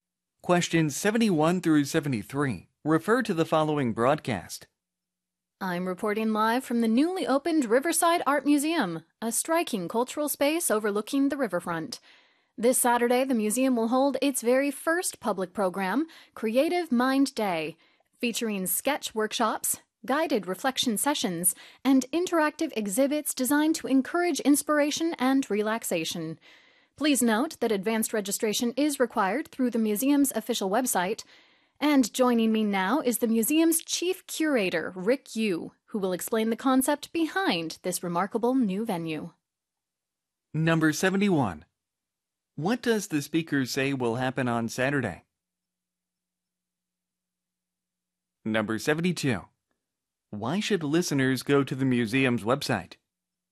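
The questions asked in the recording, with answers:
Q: What does the speaker say will happen on Saturday?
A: The museum will hold its first public program, Creative Mind Day

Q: Why should listeners go to the museum's website?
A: To register in advance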